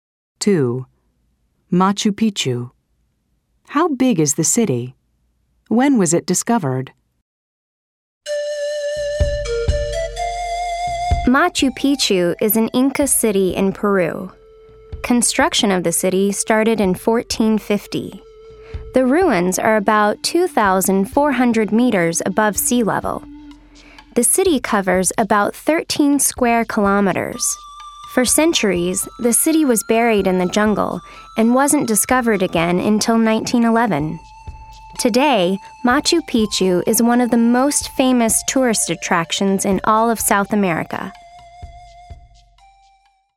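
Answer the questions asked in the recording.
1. About 13 square kilometers
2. 1911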